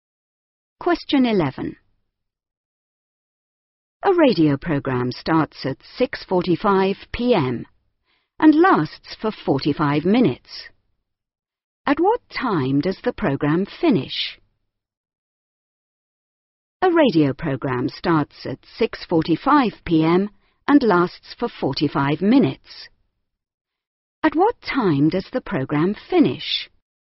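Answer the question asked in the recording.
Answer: 7:30 p.m.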